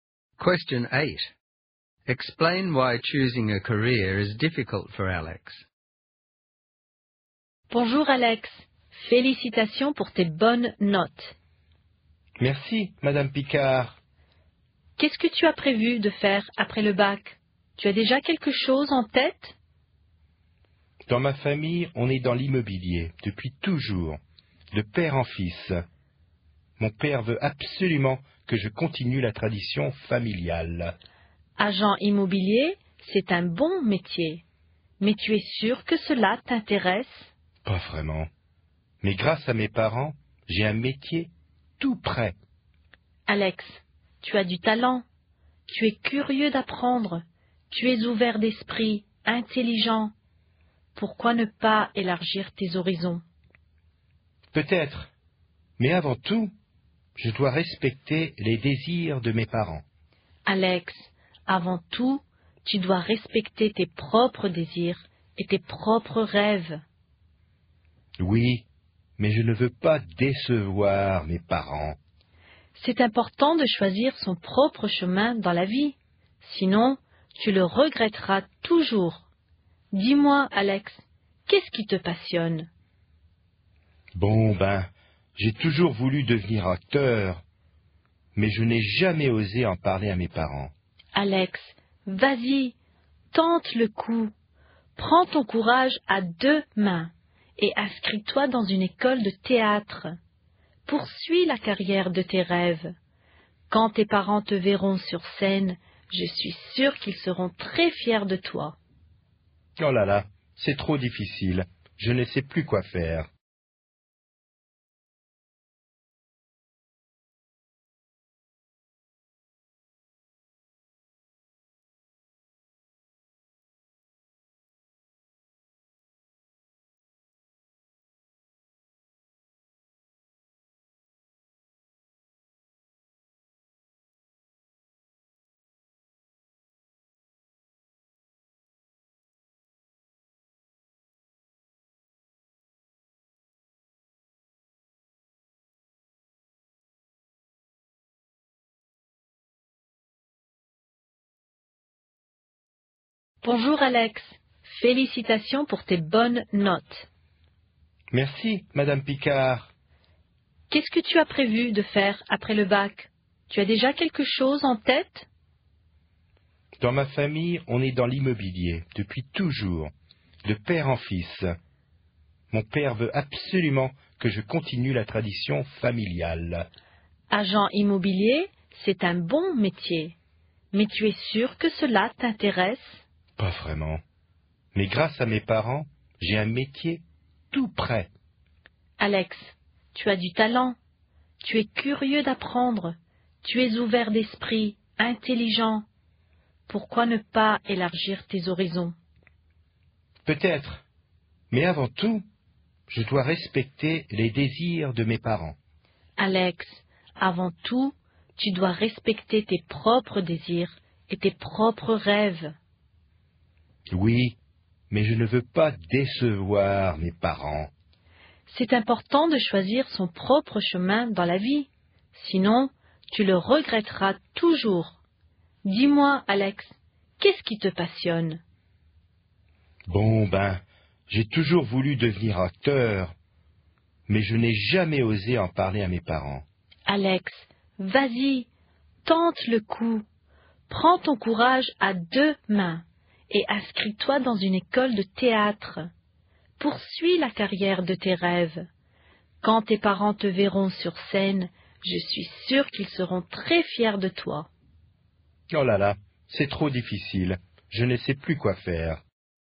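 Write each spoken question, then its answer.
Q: Explain why choosing a career is difficult for Alex.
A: His father wants him to continue the family real estate tradition and he doesn't want to disappoint his parents, but he has always dreamed of becoming an actor and has never dared to tell them.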